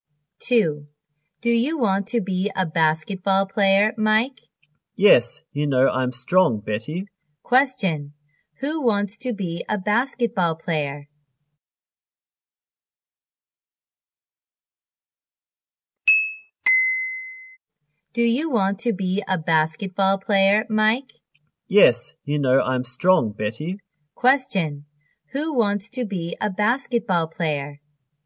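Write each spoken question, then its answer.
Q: Who wants to be a basketball player?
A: Mike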